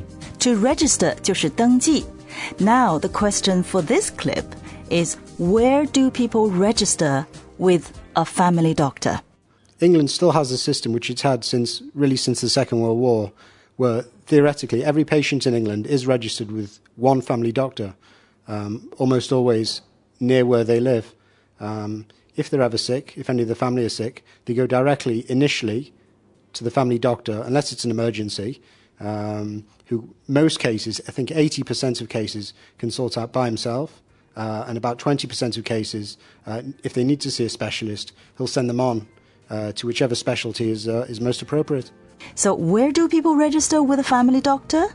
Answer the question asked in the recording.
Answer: Almost always near where they live.